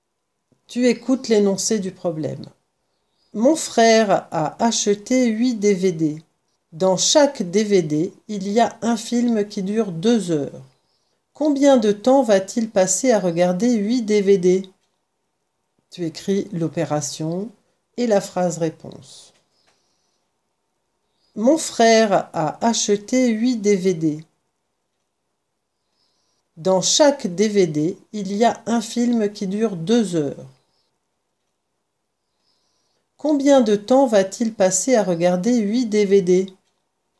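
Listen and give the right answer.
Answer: 16 heures (8 × 2)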